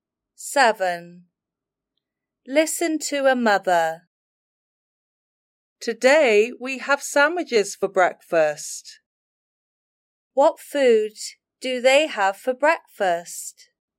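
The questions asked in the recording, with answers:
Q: What food do they have for breakfast?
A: sandwiches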